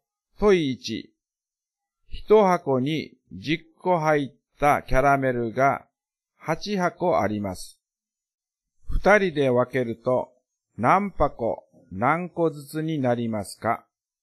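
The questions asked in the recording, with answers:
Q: 一箱に十個入ったキャラメルが八箱あります。二人で分けると何箱何個ずつになりますか?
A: 4箱40個ずつ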